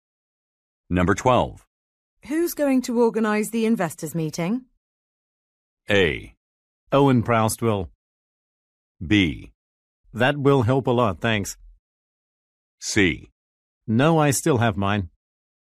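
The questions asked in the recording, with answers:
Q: Who's going to organize the investors' meeting?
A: A: Owen Proust will.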